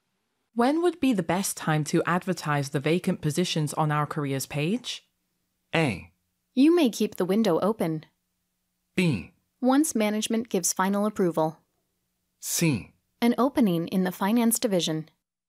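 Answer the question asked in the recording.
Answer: B: Once management gives final approval.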